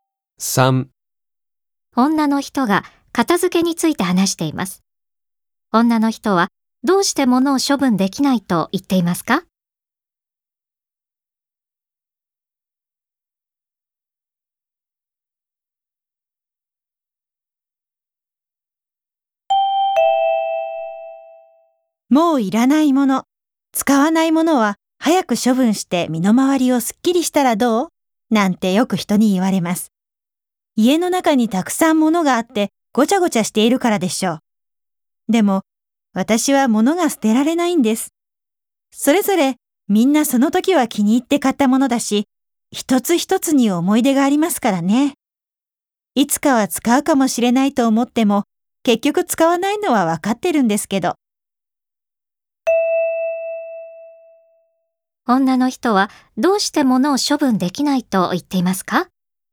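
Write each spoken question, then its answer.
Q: 女の人はどうして物を処分できないと言っていますか?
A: 一つ一つに思い出があるから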